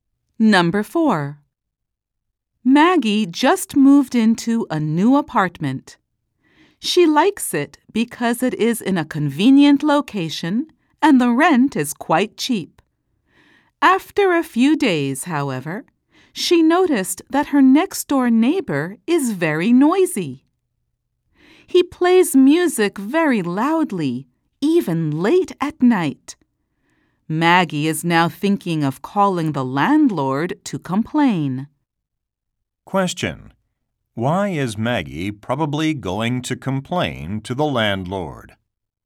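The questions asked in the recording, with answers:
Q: Why is Maggie probably going to complain to the landlord?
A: Her next-door neighbor is very noisy, playing loud music late at night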